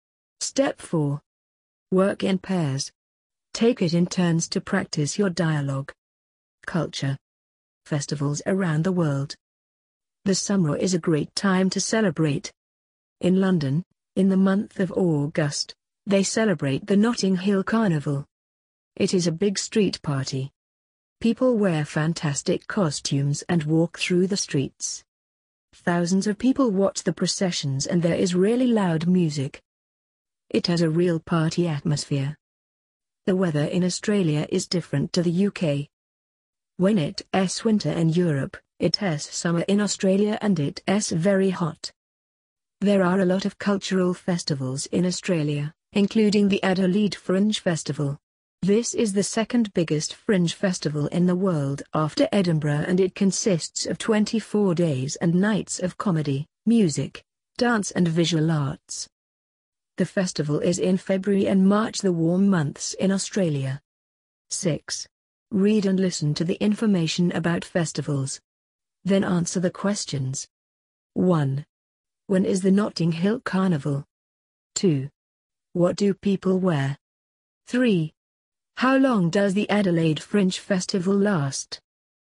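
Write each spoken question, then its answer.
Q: When is the Notting Hill Carnival?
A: In August

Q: What do people wear?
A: Fantastic costumes

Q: How long does the Adelaide Fringe Festival last?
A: 24 days and nights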